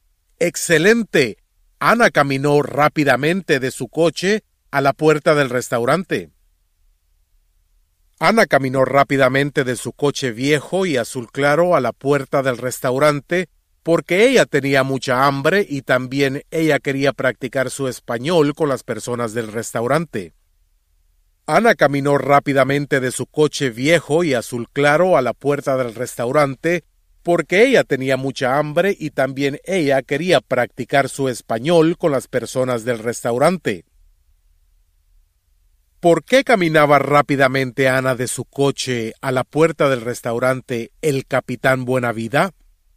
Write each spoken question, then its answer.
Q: ¿Por qué caminaba rápidamente Ana de su coche a la puerta del restaurante El Capitán Buenavida?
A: Ana caminó rápidamente de su coche a la puerta del restaurante porque ella quería practicar su español con las personas del restaurante y también ella tenía mucha hambre.